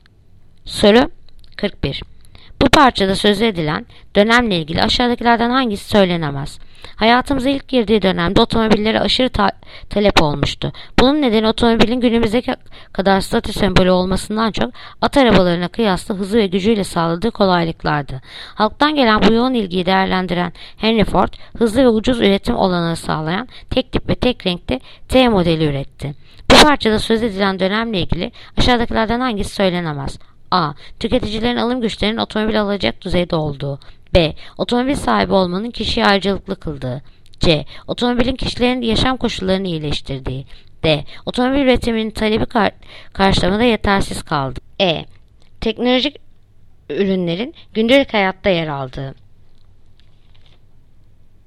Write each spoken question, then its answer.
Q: Bu parçada sözü edilen dönemle ilgili aşağıdakilerden hangisi söylenemez?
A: Yanıt: Diyarbakır. Otomobil üretiminin talebi karşılamada yetersiz kaldığı.